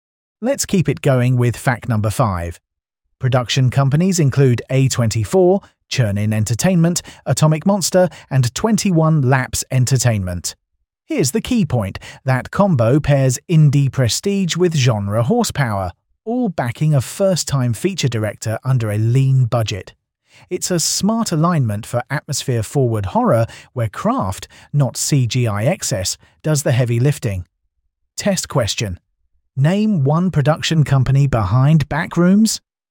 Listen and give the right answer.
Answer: Correct answer, A24.